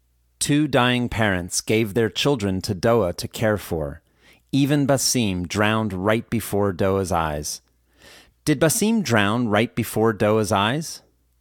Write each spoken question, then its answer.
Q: Did Basim drown right before Doa's eyes?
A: Yes, Basim drowned right before Doa's eyes.